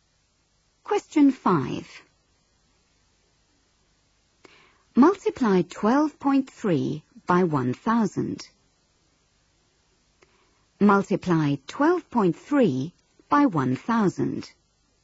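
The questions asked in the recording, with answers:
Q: Multiply 12.3 by 1,000.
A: 12300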